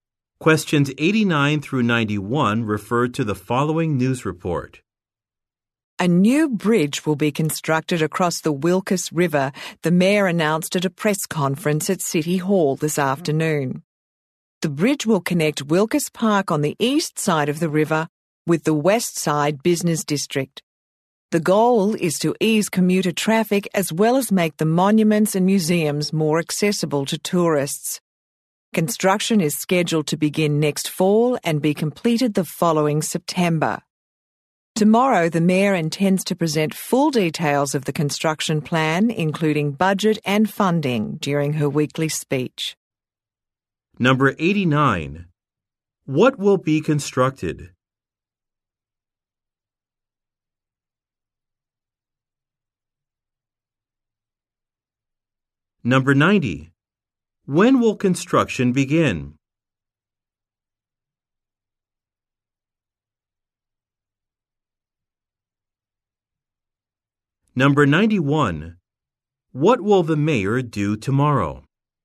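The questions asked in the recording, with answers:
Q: What will be constructed?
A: A bridge across the Wilkes River

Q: When will construction begin?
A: Next fall

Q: What will the mayor do tomorrow?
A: Present full details of the construction plan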